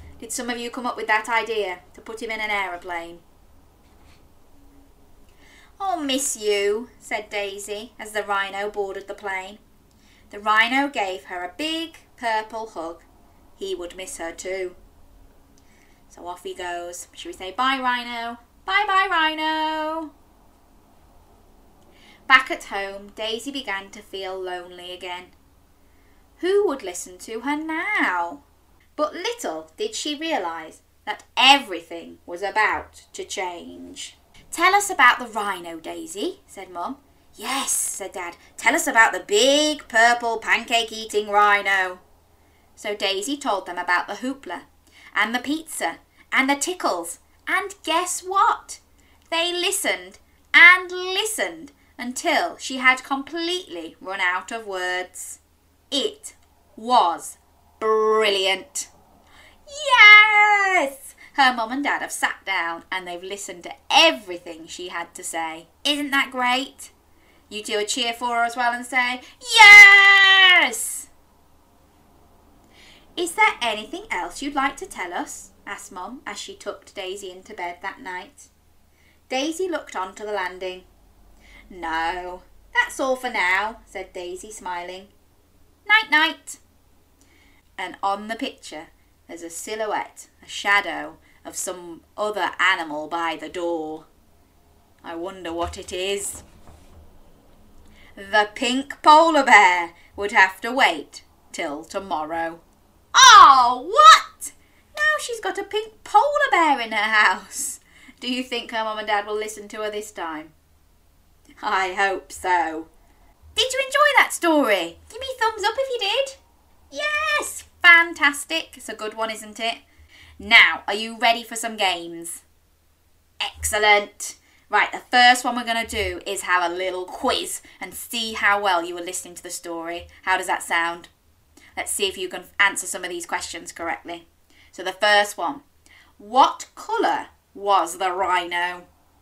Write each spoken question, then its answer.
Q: So the first one, what colour was the rhino?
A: Yes, purple.